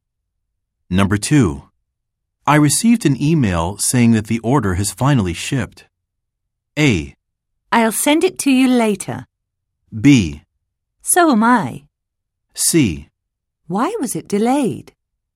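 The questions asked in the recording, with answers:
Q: I received an email saying that the order has finally shipped.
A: C: Why was it delayed?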